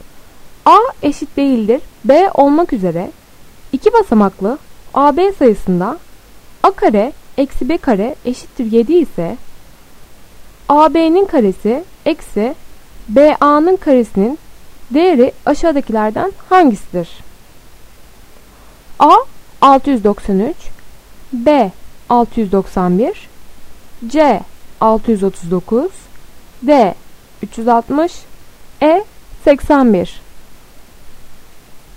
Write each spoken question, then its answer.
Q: A eşit değildir B olmak üzere 2 basamaklı AB sayısında A kare eksi B kare eşittir 7 ise AB'nin karesi eksi BA'nın karesinin değeri aşağıdakilerden hangisidir?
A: Doğru cevap A 693.